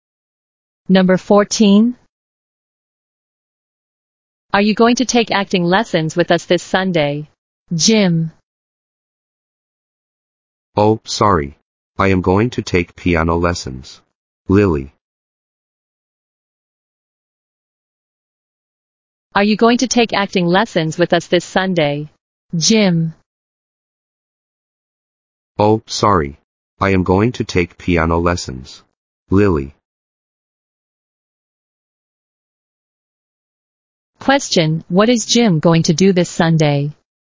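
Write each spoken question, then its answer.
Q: Question, what is Jim going to do this Sunday?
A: Take piano lessons.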